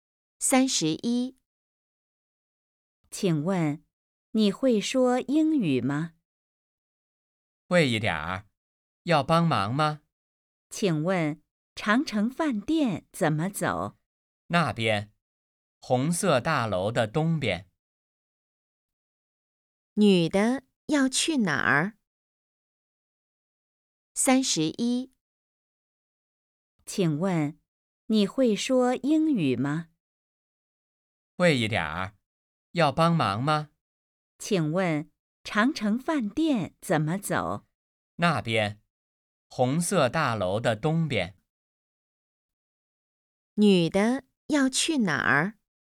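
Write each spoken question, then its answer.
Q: 女的要去哪儿?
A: 长城饭店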